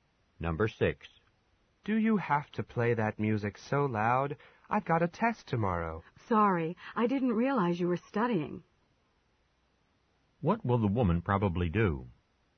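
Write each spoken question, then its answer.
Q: What will the woman probably do?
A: Turn the music down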